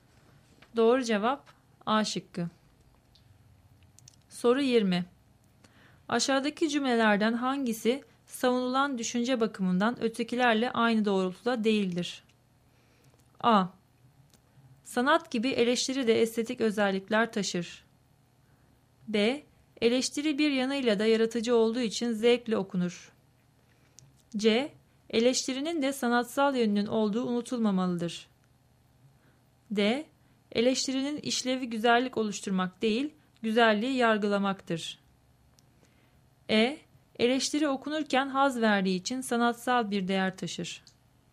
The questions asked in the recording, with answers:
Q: Aşağıdaki cümlelerden hangisi savunulan düşünce bakımından ötekilerle aynı doğrultuda değildir?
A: Doğru cevap D şıkkı.